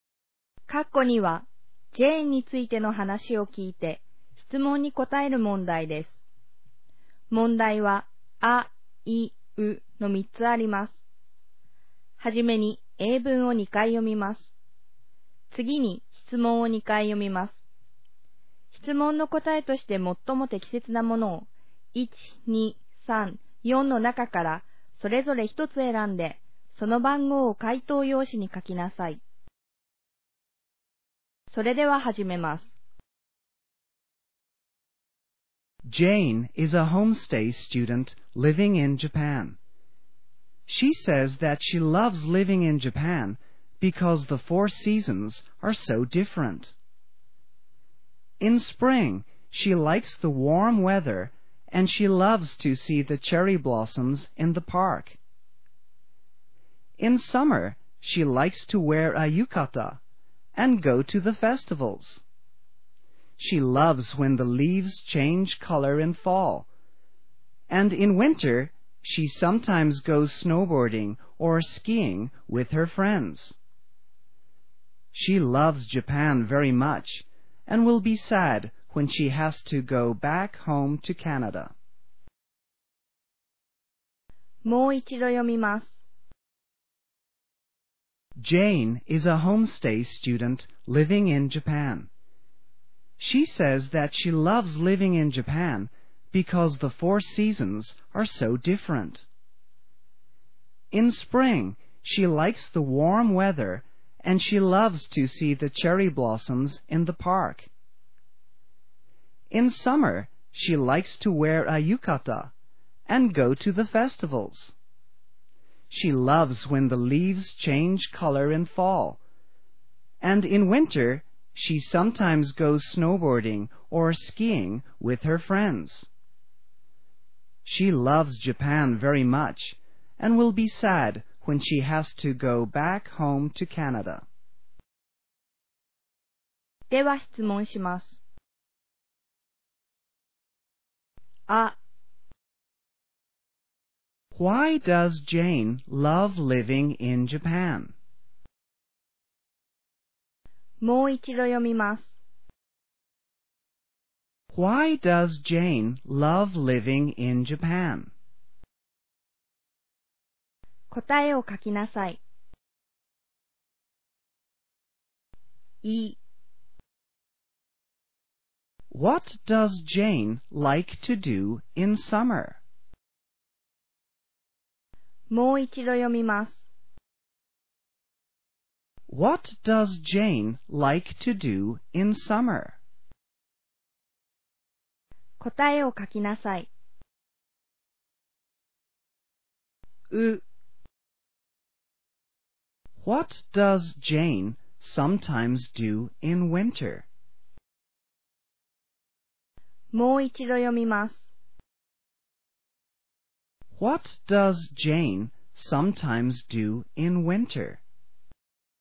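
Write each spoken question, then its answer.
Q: Why does Jane love living in Japan?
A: Because the four seasons are so different.

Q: What does Jane like to do in summer?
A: She likes to wear a yukata and go to the festivals.

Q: What does Jane sometimes do in winter?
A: She goes snowboarding or skiing with her friends.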